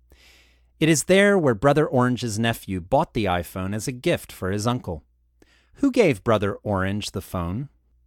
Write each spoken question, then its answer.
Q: Who gave Brother Orange the phone?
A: His nephew bought the iPhone in Shenzhen and gave it to him as a gift.